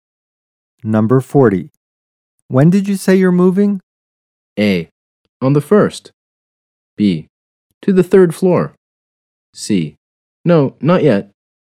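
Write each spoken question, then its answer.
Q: When did you say you're moving?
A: A: On the first.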